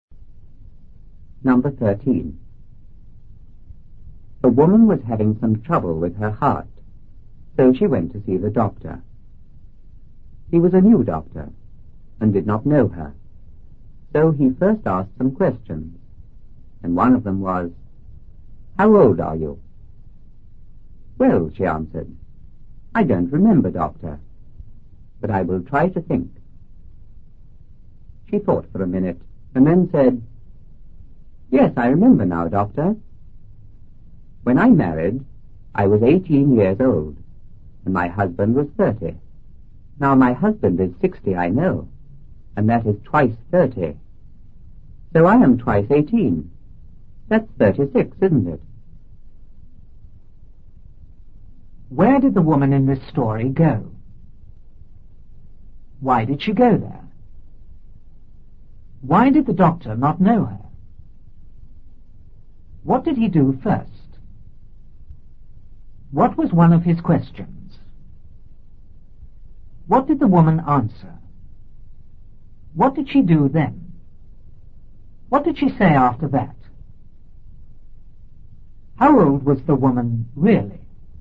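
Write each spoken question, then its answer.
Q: Where did the woman in this story go?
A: To the doctor

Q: Why did she go there?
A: She was having some trouble with her heart

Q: Why did the doctor not know her?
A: He was a new doctor

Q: What did he do first?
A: He asked her some questions

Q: What was one of his questions?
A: How old are you?

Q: What did the woman answer?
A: She didn't remember but would try to think

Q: What did she do then?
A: She thought for a minute

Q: What did she say after that?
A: She was 18 when she married and her husband was 30; now he is 60, twice 30, so she is twice 18, 36

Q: How old was the woman really?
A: 48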